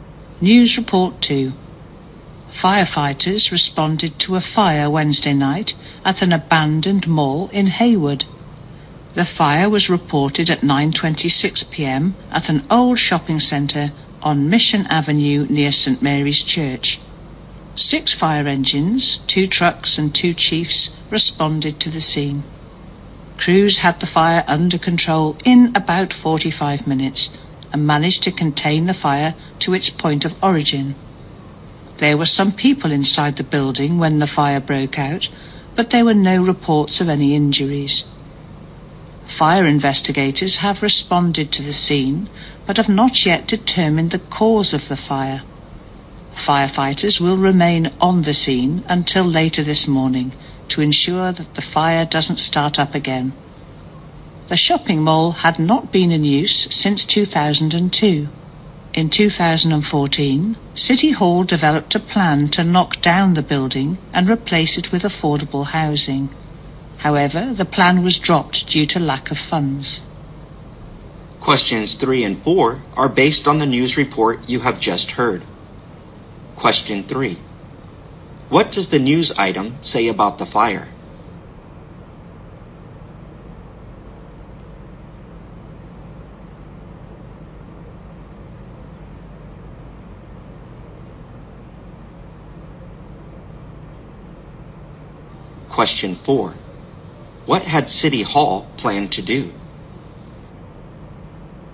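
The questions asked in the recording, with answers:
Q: What does the news item say about the fire?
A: No one was reported injured, and it was kept to where it started

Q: What had City Hall planned to do?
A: Knock down the mall and build affordable housing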